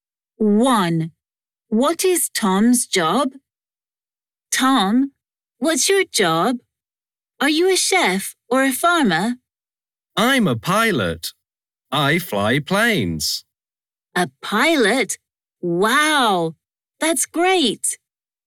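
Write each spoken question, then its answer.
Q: What is Tom's job?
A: a pilot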